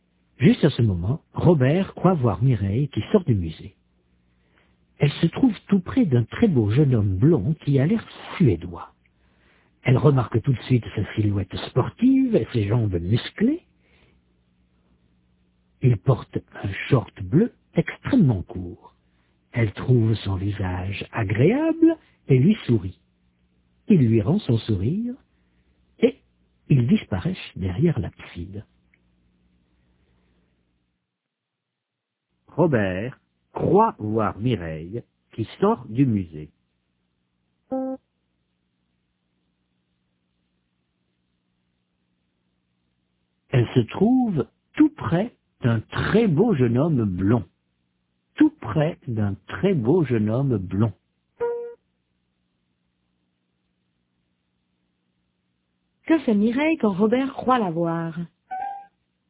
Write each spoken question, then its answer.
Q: Que fait Mireille quand Robert croit la voir?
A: Elle sort du musée.